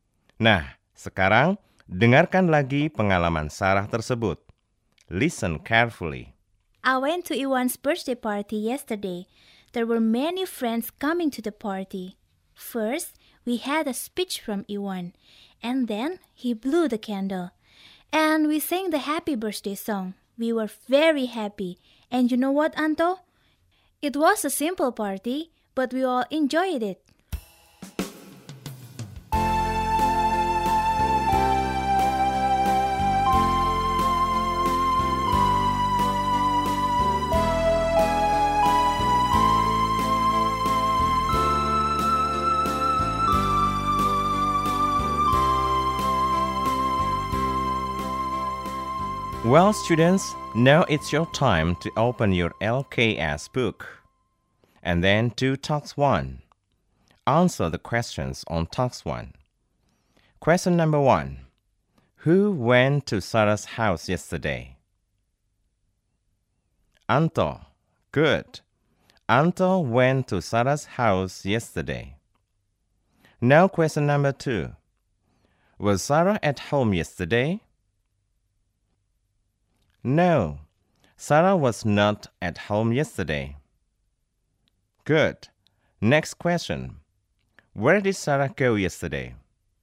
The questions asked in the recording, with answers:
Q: Where did Sarah go yesterday?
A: To Iwan's birthday party.